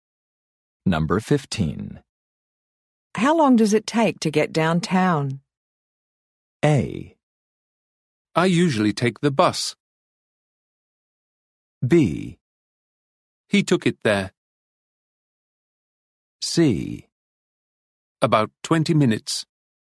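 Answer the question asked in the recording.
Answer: C: About 20 minutes.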